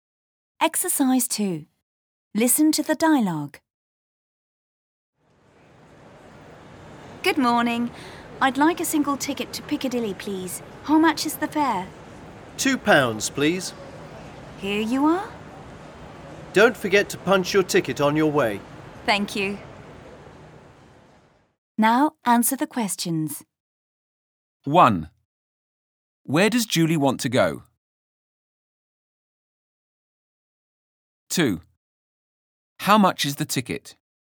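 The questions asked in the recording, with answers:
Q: Where does Julie want to go?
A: To Piccadilly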